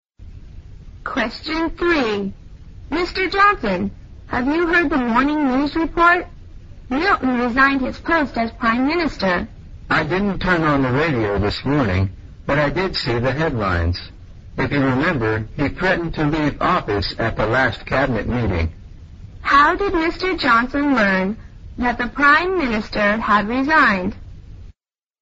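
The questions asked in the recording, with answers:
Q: How did Mr. Johnson learn that the Prime Minister had resigned?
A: He saw the headlines in the newspaper.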